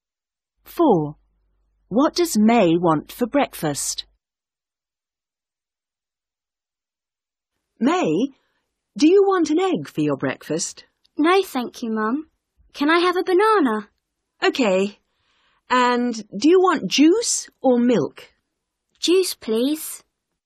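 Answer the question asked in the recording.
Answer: a banana and juice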